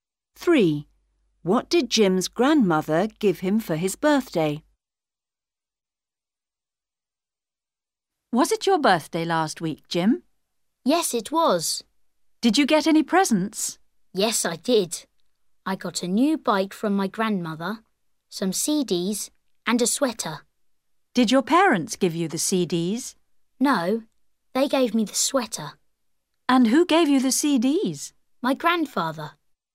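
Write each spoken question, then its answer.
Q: What did Jim's grandmother give him for his birthday?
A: A new bike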